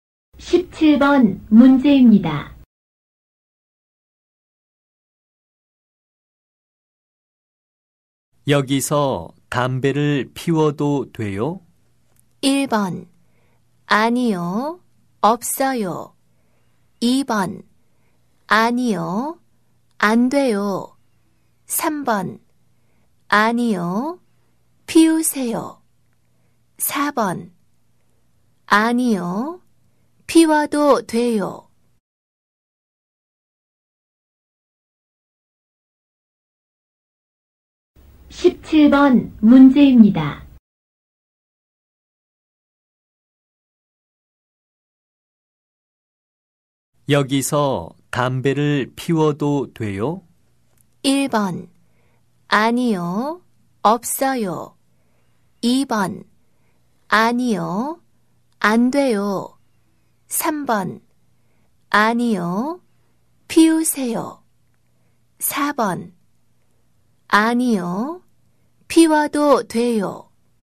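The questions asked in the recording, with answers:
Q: 여기서 담배를 피워도 돼요?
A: 2: 아니요. 안 돼요.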